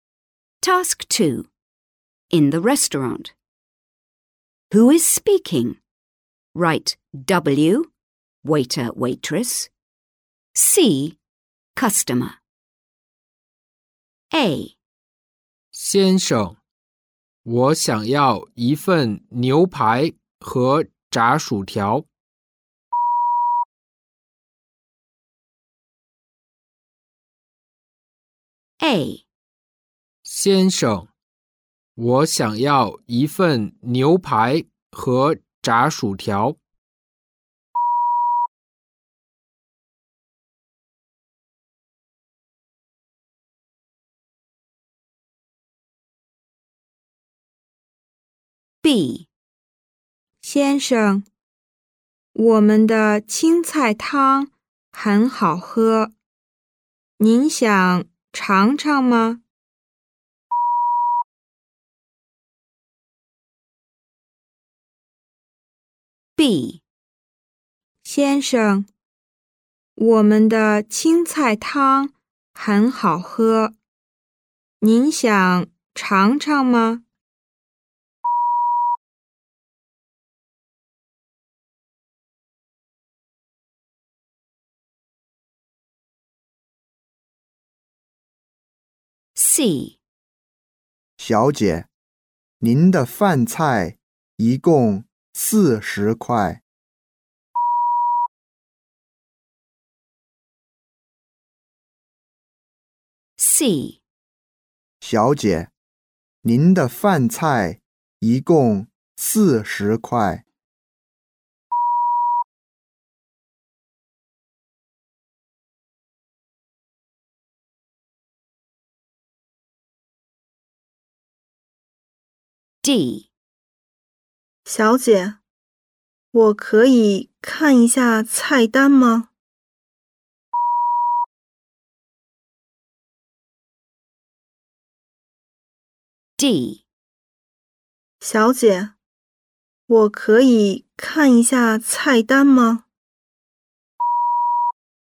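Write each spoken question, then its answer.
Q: Who is speaking? Write W, waiter, waitress.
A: C: customer

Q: Who is speaking? Write W, waiter, waitress.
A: W: waiter

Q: Who is speaking? Write W, waiter, waitress.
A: W: waiter

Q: Who is speaking? Write W, waiter, waitress.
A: C: customer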